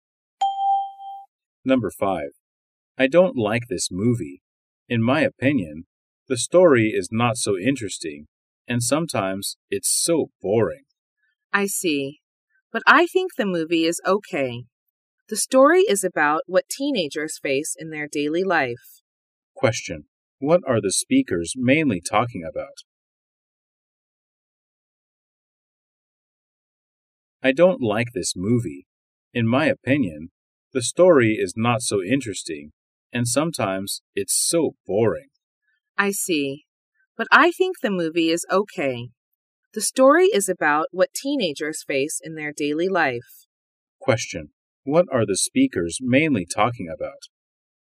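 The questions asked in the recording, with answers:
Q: What are the speakers mainly talking about?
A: A movie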